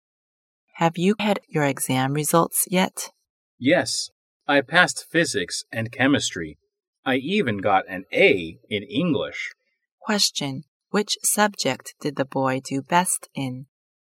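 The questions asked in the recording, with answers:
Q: Question, which subject did the boy do best in?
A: English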